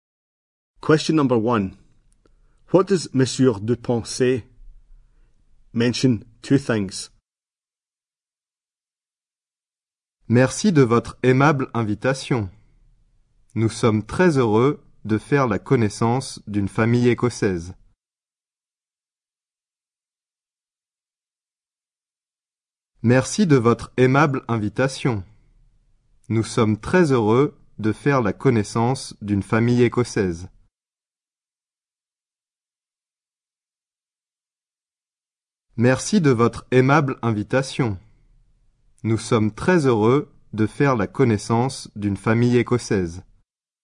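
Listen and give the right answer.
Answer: Thanks for the kind invitation; very happy to meet a Scottish family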